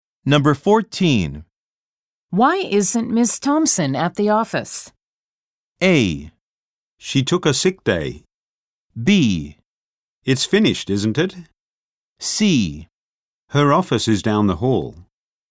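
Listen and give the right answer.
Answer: A: She took a sick day.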